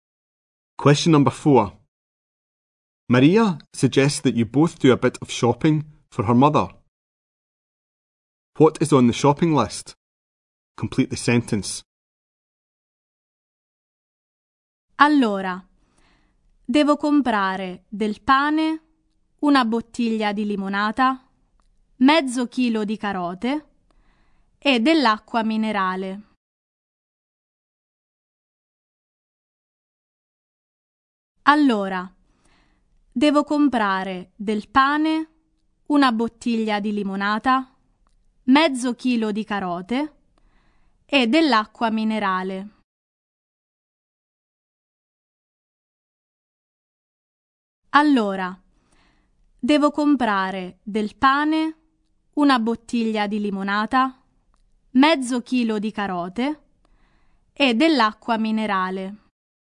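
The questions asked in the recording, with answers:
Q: What is on the shopping list?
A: Bread, a bottle of lemonade, half a kilo of carrots and mineral water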